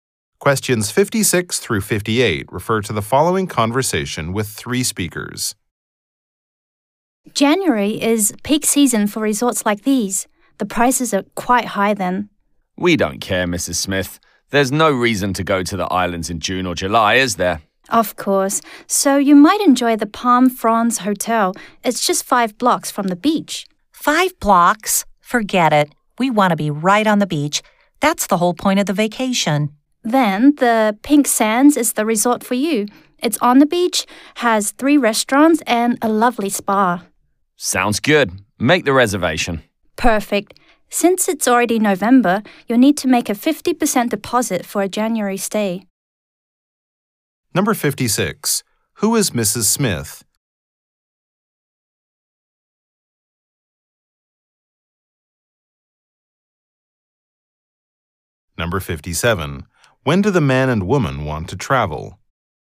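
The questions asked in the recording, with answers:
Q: When do the man and woman want to travel?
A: In January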